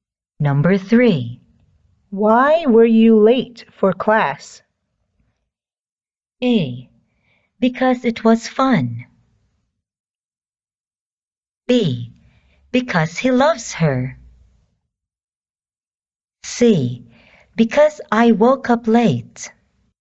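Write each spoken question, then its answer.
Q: Why were you late for class?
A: C: Because I woke up late.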